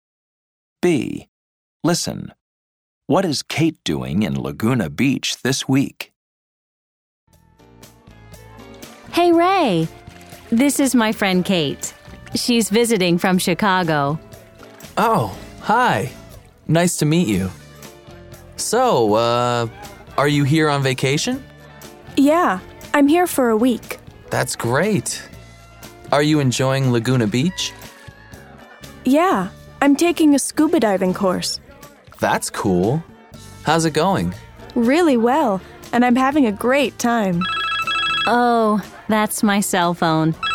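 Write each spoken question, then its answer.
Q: What is Kate doing in Laguna Beach this week?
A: She's on vacation and taking a scuba diving course.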